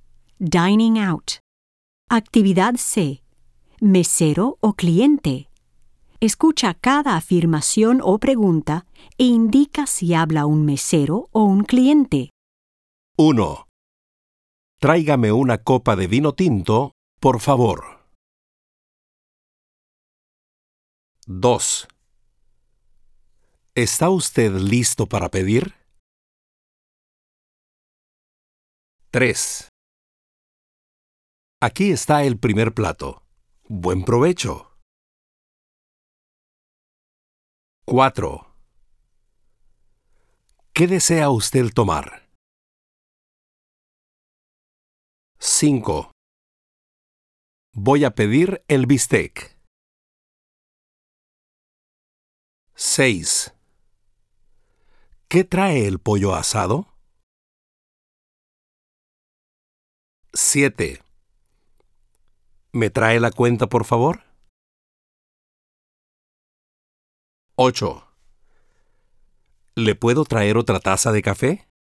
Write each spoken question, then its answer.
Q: Tráigame una copa de vino tinto, por favor.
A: 1. Cliente.

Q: ¿Está usted listo para pedir?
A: 2. Mesero.

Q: Aquí está el primer plato. Buen provecho.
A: 3. Mesero.

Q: ¿Qué desea usted tomar?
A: 4. Mesero.

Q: Voy a pedir el bistec.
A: 5. Cliente.

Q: ¿Qué trae el pollo asado?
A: 6. Cliente.

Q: ¿Me trae la cuenta, por favor?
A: 7. Cliente.

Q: ¿Le puedo traer otra taza de café?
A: 8. Mesero.